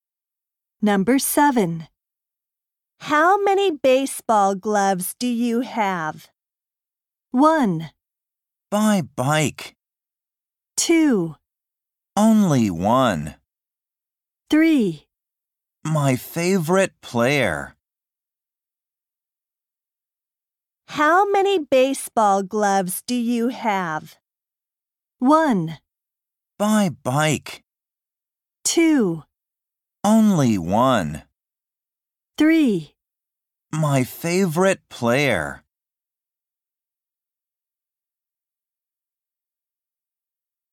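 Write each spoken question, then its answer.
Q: How many baseball gloves do you have?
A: 2: Only one.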